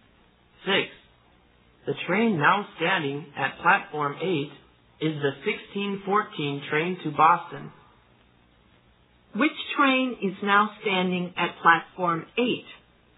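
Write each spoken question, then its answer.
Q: Which train is now standing at Platform 8?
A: The 1614 train to Boston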